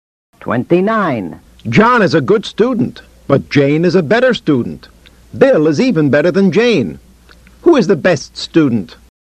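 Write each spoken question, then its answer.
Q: Who is the best student?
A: Bill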